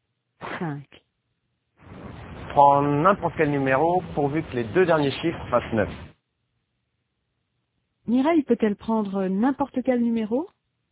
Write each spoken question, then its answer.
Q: Mireille peut-elle prendre n'importe quel numéro?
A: Oui, pourvu que les deux derniers chiffres fassent 9.